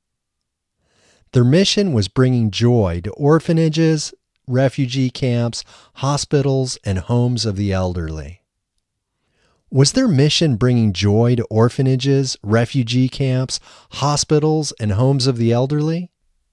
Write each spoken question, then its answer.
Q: Was their mission bringing joy to orphanages, refugee camps, hospitals, and homes of the elderly?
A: Yes, their mission was bringing joy to orphanages, refugee camps, hospitals, and homes of the elderly.